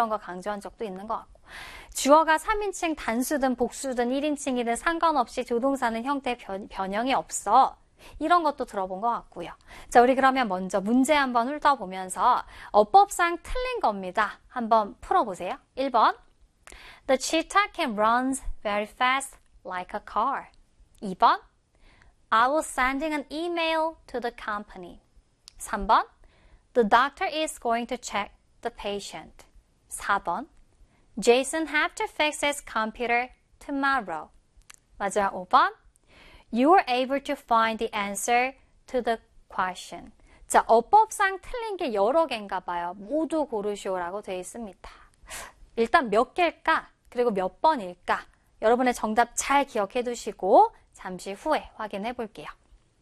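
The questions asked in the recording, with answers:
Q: 어법상 틀린 겁니다. 한번 풀어보세요.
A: 4: Jason have to fix his computer tomorrow.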